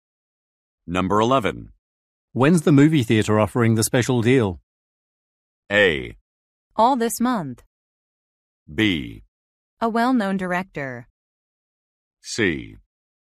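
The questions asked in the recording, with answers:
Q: When's the movie theater offering the special deal?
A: A: All this month.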